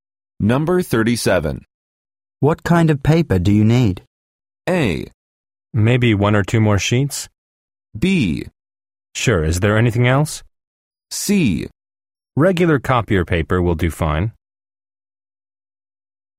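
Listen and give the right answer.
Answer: C: Regular copier paper will do fine.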